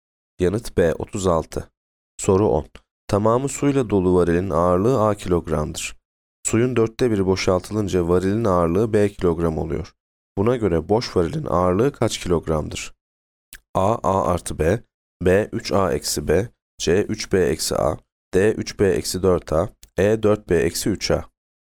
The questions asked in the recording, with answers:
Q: Buna göre boş varilin ağırlığı kaç kilogramdır?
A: Yanıt E 4B eksi 3A.